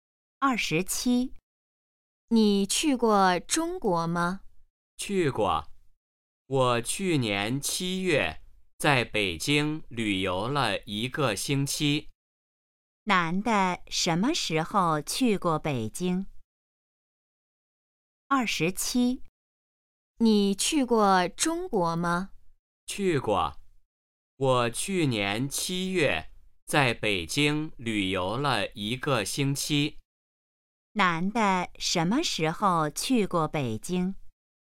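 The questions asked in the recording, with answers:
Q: 男的什么时候去过北京?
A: 去年7月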